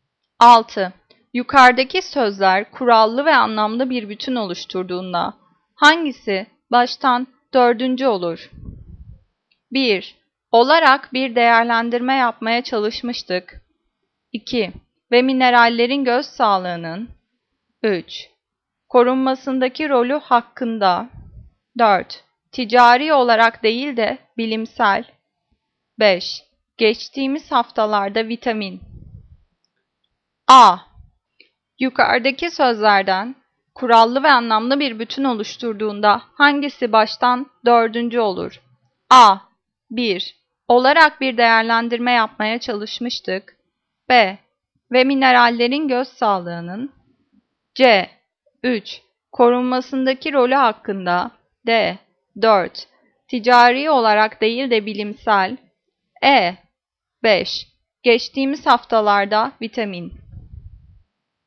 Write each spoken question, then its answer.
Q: Yukarıdaki sözler kurallı ve anlamlı bir bütün oluşturduğunda hangisi baştan dördüncü olur?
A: Cevap D. 4. Ticari olarak değil de bilimsel.